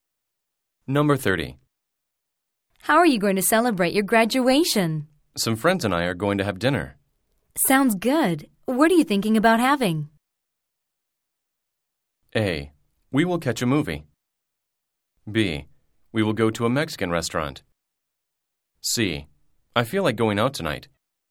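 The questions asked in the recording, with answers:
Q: Sounds good. What are you thinking about having?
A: B: We will go to a Mexican restaurant.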